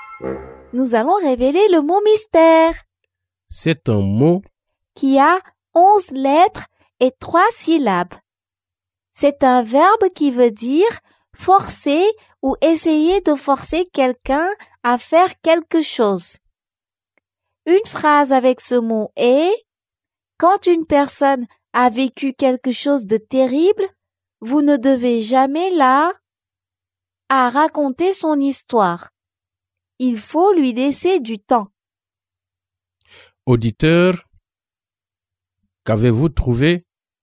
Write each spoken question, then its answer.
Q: Auditeur, qu'avez-vous trouvé?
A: Le mot mystère est « contraindre ».